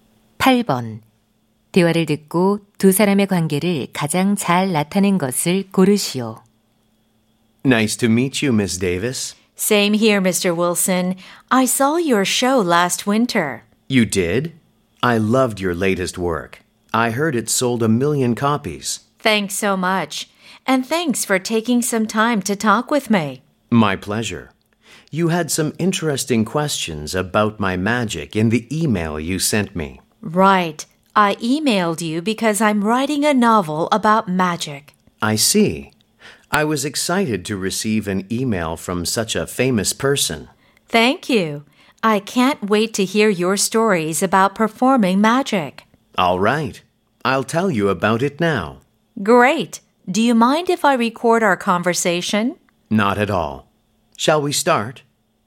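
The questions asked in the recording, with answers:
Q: 대화를 듣고 두 사람의 관계를 가장 잘 나타낸 것을 고르시오.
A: 소설가 - 마술사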